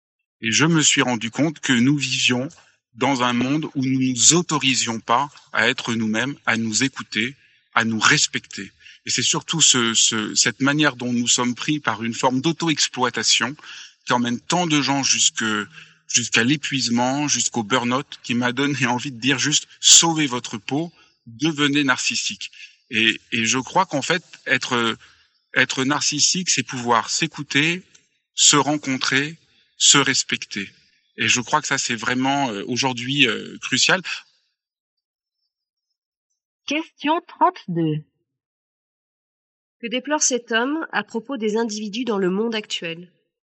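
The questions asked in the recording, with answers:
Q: Que déplore cet homme à propos des individus dans le monde actuel ?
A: Ils ne s'autorisent pas à être eux-mêmes, à s'écouter et se respecter, et s'auto-exploitent jusqu'à l'épuisement.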